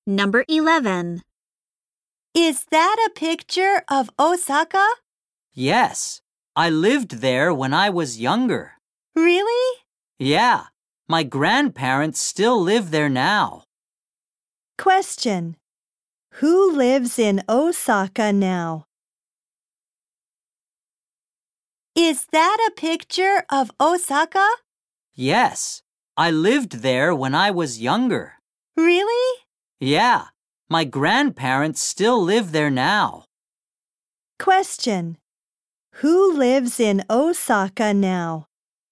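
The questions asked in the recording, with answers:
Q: Who lives in Osaka now?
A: The speaker's grandparents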